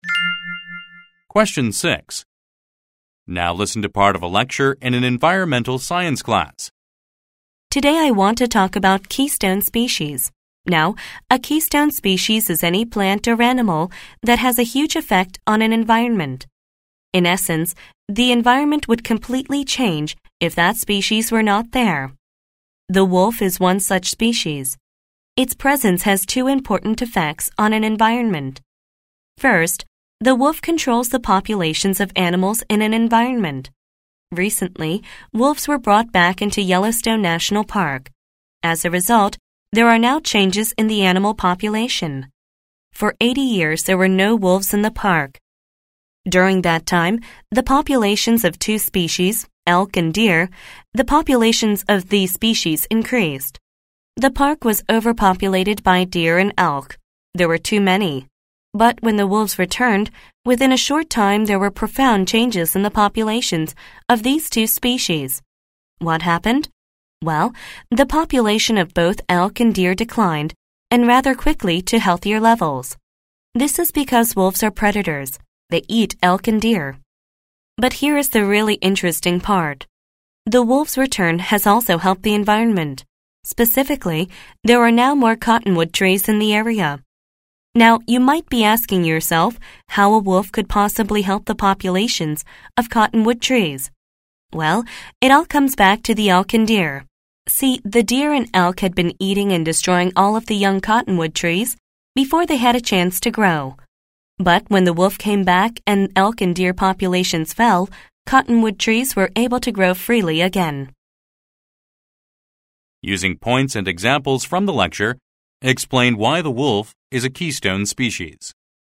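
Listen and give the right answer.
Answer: Wolves hugely change the environment: by preying on elk and deer they cut those overlarge populations to healthier levels, and with fewer elk and deer eating young trees, cottonwood trees can grow again.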